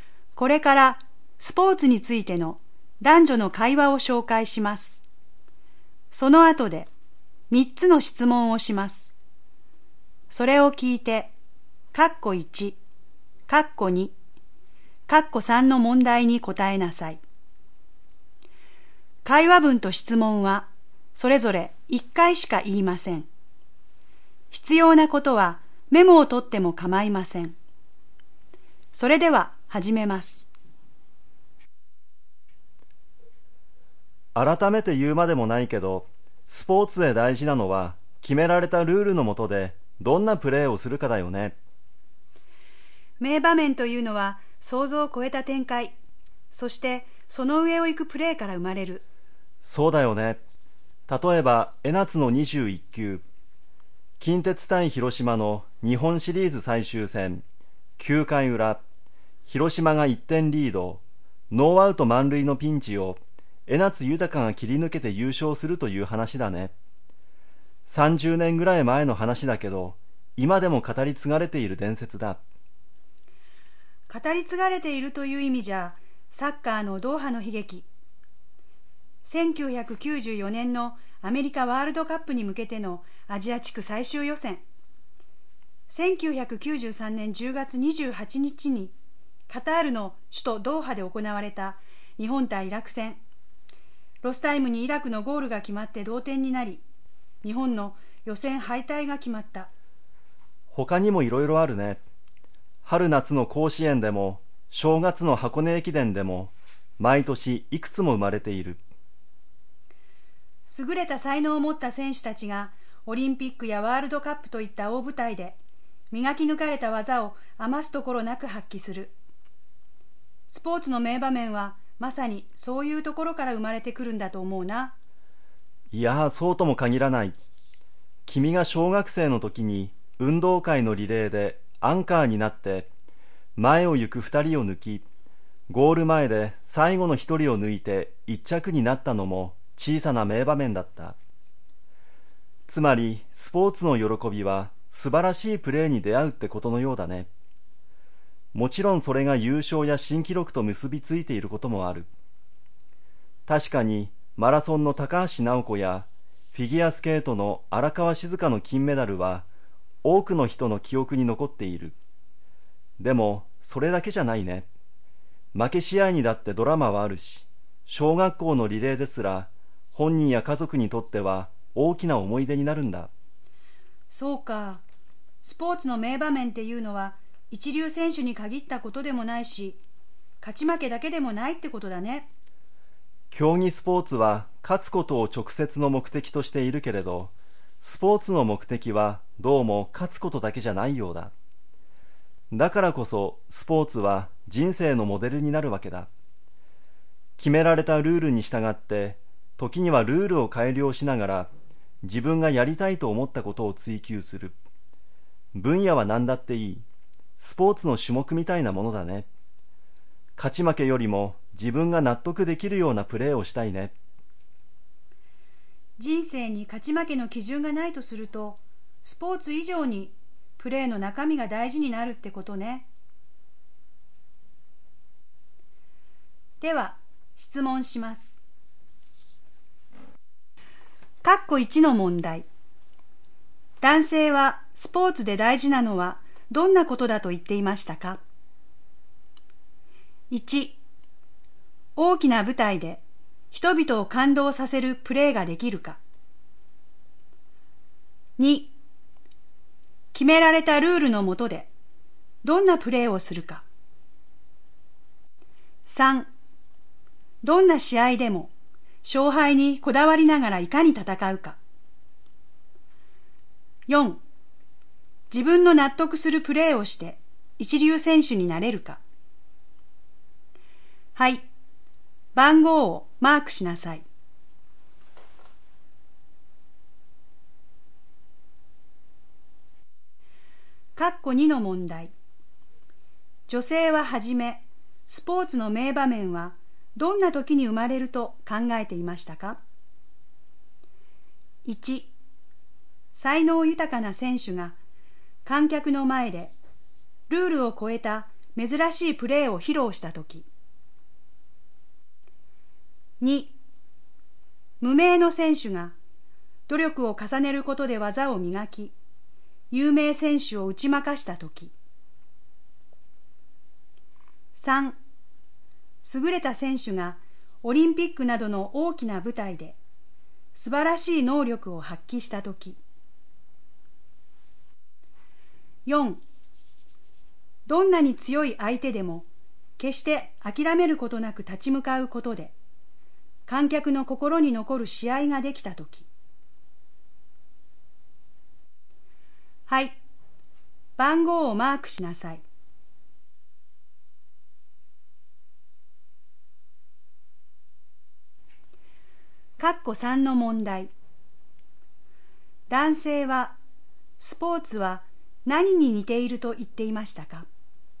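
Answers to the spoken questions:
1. 2: 決められたルールの下でどんなプレーをするか。
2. 3: 優れた選手がオリンピックなどの大きな舞台で素晴らしい能力を発揮した時。
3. 人生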